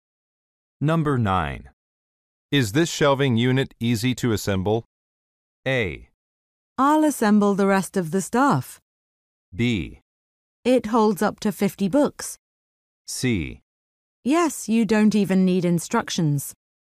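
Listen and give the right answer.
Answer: C: Yes, you don't even need instructions.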